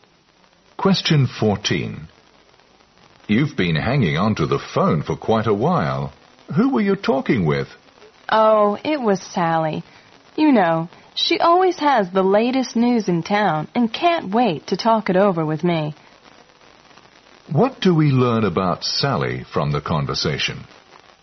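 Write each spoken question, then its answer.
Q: What do we learn about Sally from the conversation?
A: She likes to gossip about the latest news in town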